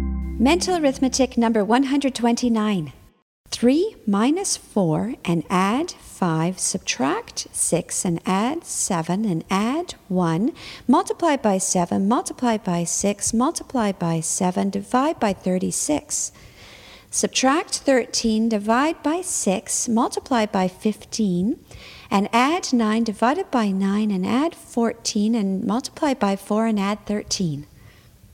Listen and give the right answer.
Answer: And the answer is 113.